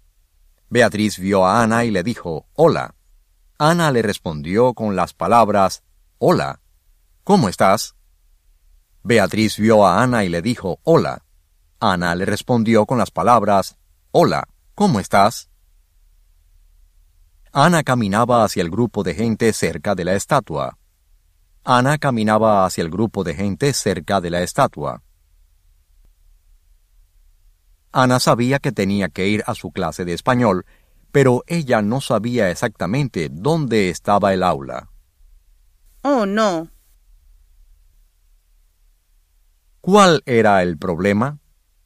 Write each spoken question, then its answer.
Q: ¿Cuál era el problema?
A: Ana tenía que ir a su clase de español, pero ella no sabía exactamente dónde estaba la aula.